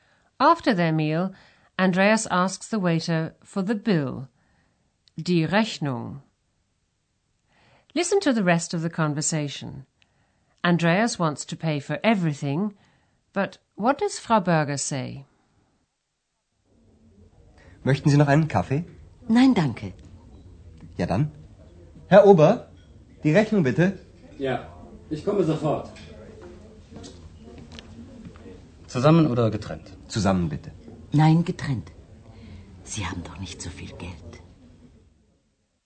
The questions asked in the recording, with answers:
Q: Andreas wants to pay for everything, but what does Frau Berger say?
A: But Frau Berger says she would rather have a separate bill.